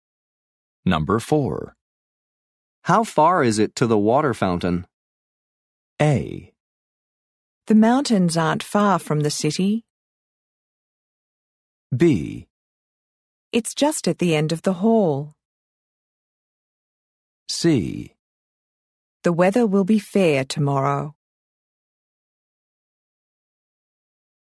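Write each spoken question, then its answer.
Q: How far is it to the water fountain?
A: B: It's just at the end of the hall.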